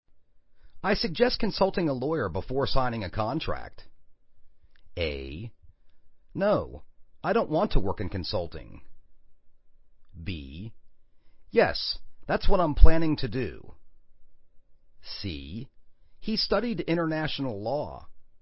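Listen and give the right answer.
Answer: B: Yes, that's what I'm planning to do.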